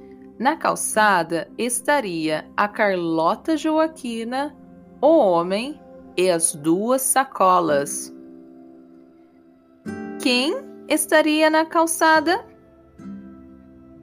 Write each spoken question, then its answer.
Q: Quem estaria na calçada?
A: Na calçada estaria a Carlota Joaquina, o homem e as duas sacolas do homem.